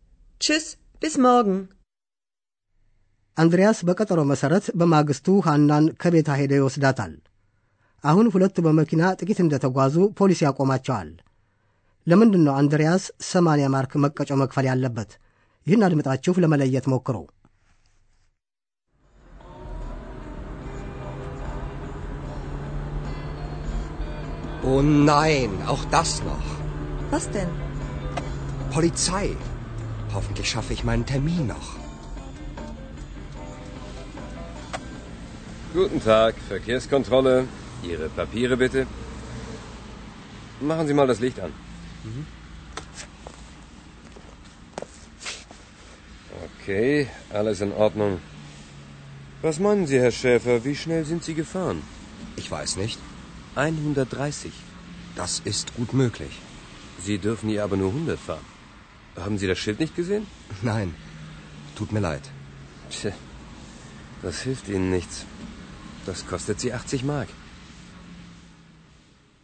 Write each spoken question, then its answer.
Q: ለምንድን ነው አንድሪያስ ሰማንያ ማርክ መቀጮ መክፈል ያለበት?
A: አንድሪያስ 80 ማርክ መቀጮ መክፈል ያለበት በጣም ፈጥኖ በመንዳቱ ነው።